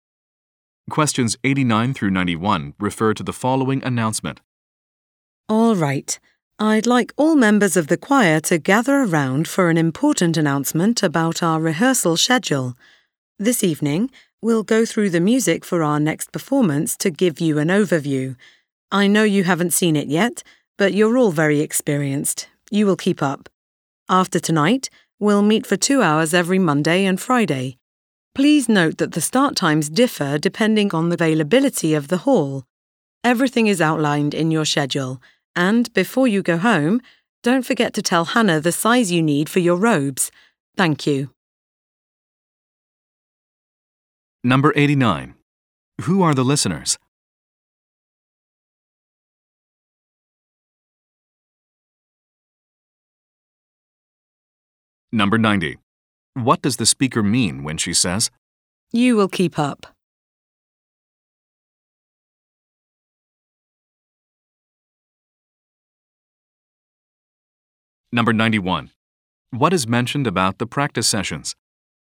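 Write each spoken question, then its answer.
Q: Who are the listeners?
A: Choir members

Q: What is mentioned about the practice sessions?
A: Start times differ depending on hall availability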